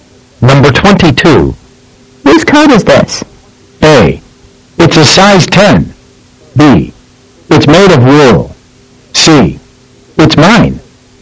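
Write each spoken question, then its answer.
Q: Whose coat is this?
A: C: It's mine.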